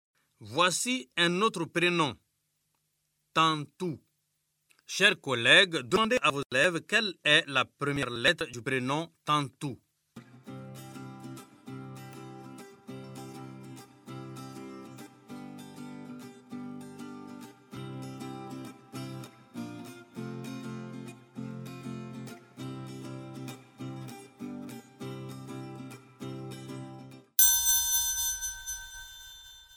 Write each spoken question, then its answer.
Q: Chers collègues, demandez à vos élèves quelle est la première lettre du prénom Tantou.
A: Monsieur, je sais. Tantou commence par la lettre T.